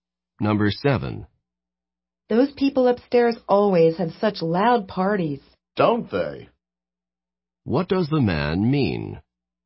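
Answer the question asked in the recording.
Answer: He agrees that the people upstairs have loud parties.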